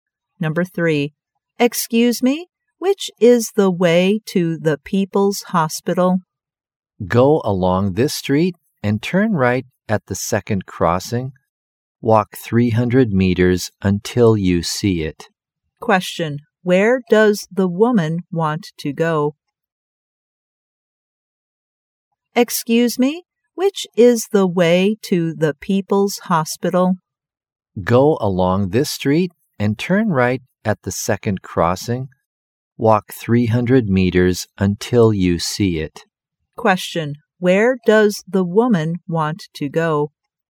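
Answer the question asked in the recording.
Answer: The People's Hospital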